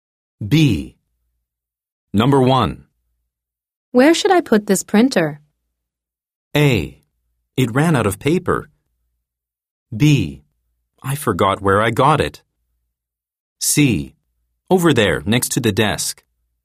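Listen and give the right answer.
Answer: C: Over there, next to the desk.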